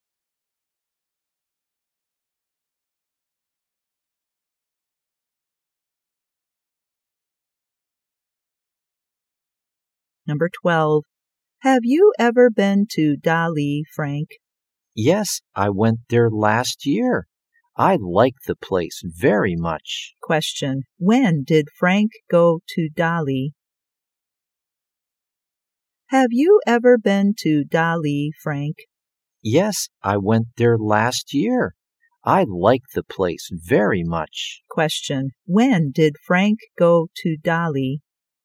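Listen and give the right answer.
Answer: Last year.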